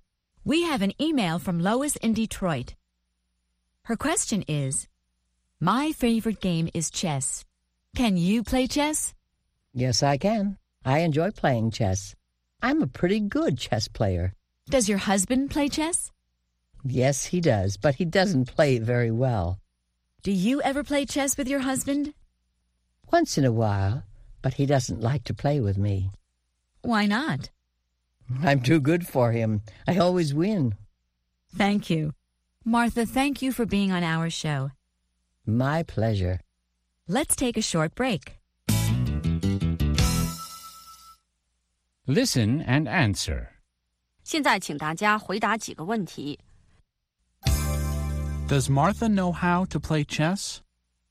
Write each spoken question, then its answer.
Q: Does Martha know how to play chess?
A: Yes, she does.